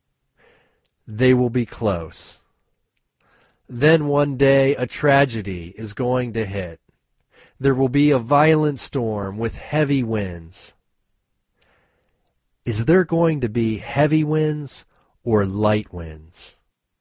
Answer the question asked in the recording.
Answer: There is going to be heavy winds.